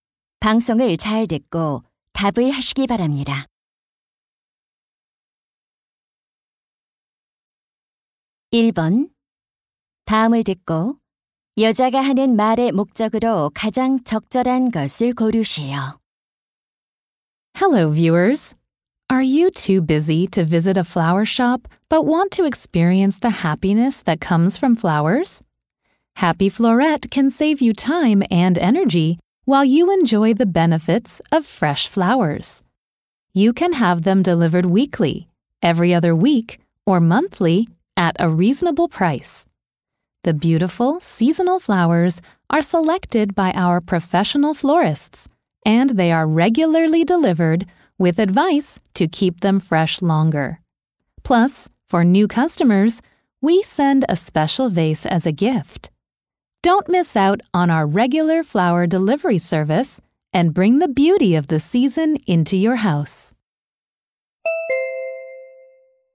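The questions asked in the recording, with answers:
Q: 다음을 듣고 여자가 하는 말의 목적으로 가장 적절한 것을 고르시오.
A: 정기 꽃 배달 서비스를 홍보하려고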